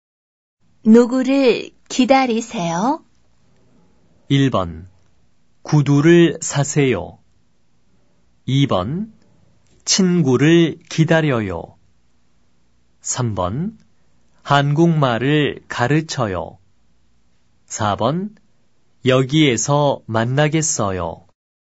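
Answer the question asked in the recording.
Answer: 2: 친구를 기다려요.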